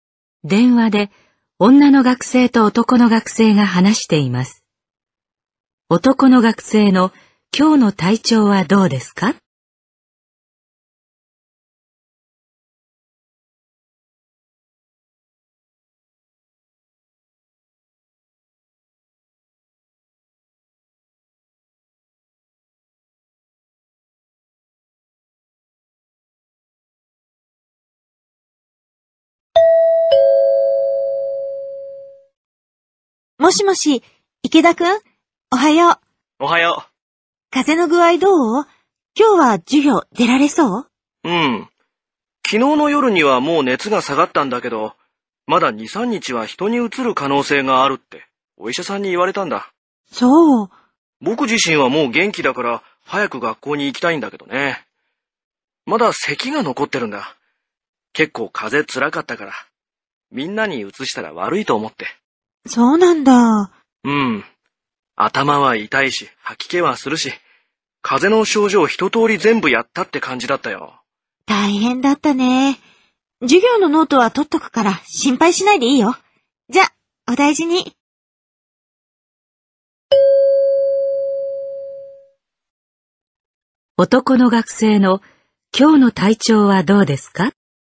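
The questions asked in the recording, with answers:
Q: 男の学生の今日の体調はどうですか?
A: 熱は下がって元気だが、まだ咳が残っている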